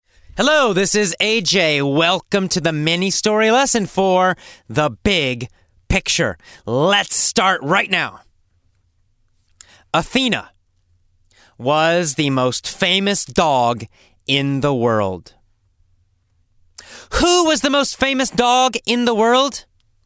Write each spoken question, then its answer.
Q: Who was the most famous dog in the world?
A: Athena. Athena was the most famous dog in the world.